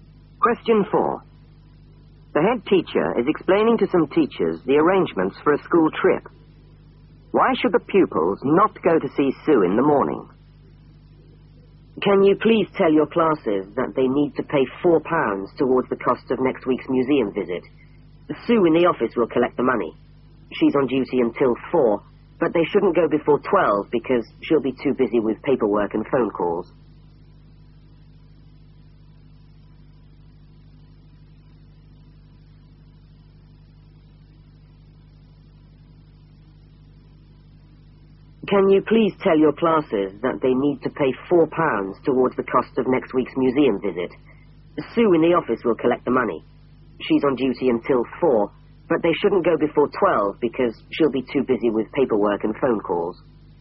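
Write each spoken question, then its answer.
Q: Why should the pupils not go to see Sue in the morning?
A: She'll be too busy with paperwork and phone calls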